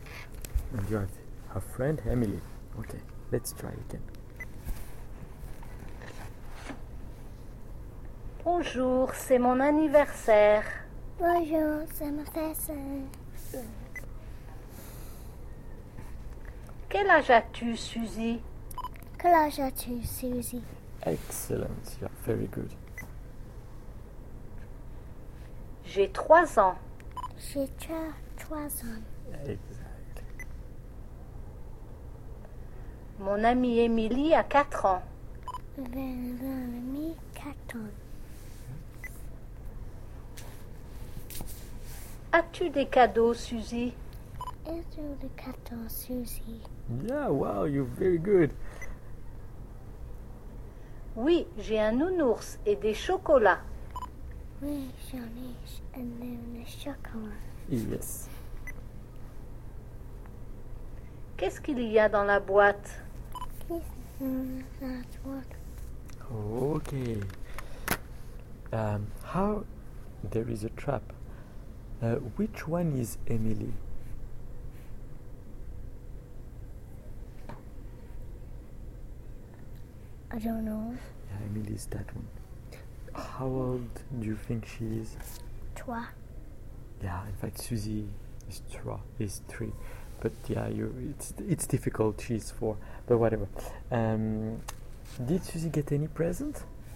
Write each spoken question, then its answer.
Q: How old do you think she is?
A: She's 4.